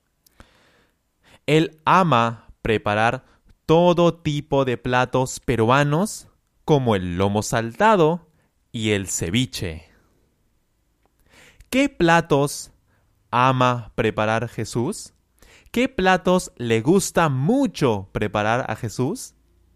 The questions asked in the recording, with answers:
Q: ¿Qué platos ama preparar Jesús?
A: Lomo saltado y ceviche.